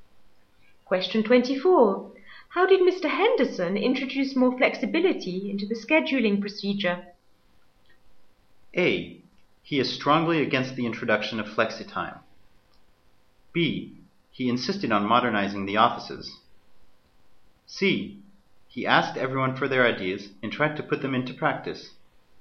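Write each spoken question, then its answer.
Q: How did Mr. Henderson introduce more flexibility into the scheduling procedure?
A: C: He asked everyone for their ideas and tried to put them into practice.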